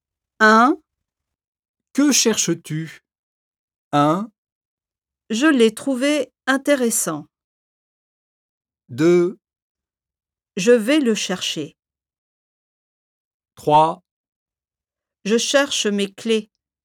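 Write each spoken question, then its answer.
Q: Que cherches-tu ?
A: 3: Je cherche mes clés.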